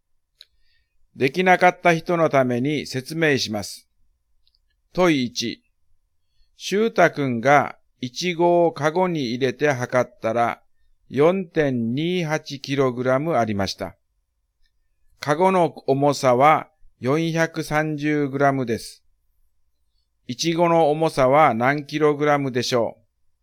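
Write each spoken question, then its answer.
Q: イチゴの重さは何 kg でしょう?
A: 3.85kg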